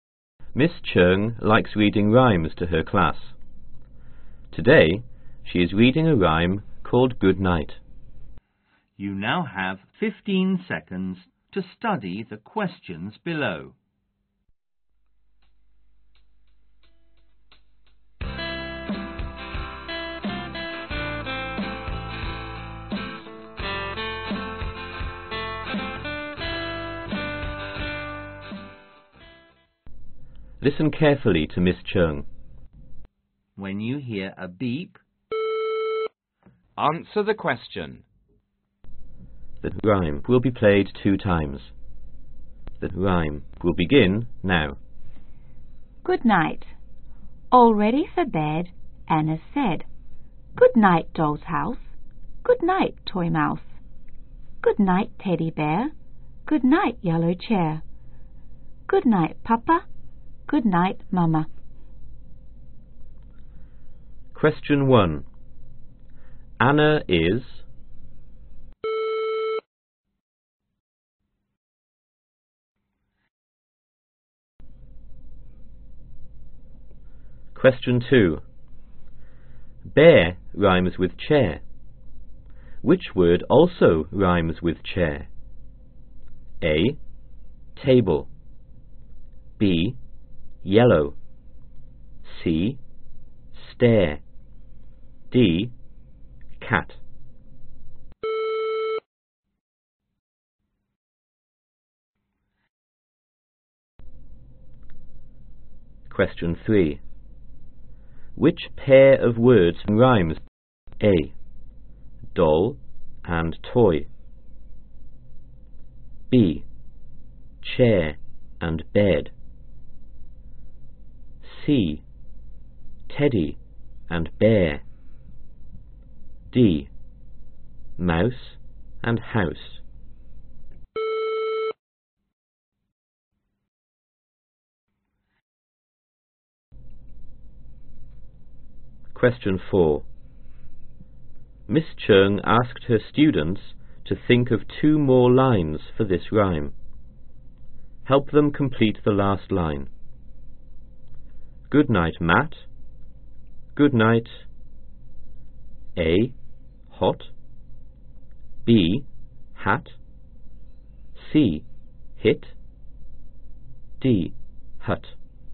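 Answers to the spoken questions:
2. C: Stare
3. D: Mouse and house
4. B: Hat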